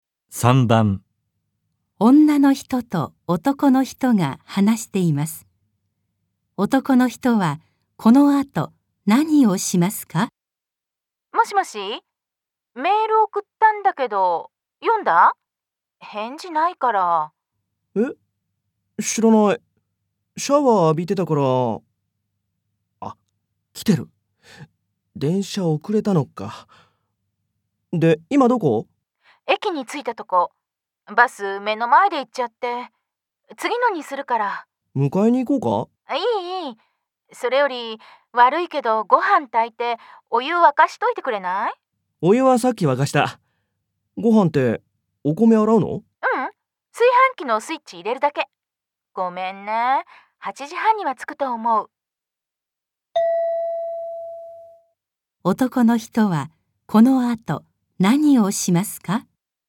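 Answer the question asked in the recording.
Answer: お米を洗って、ご飯を炊く(炊飯器のスイッチを入れる)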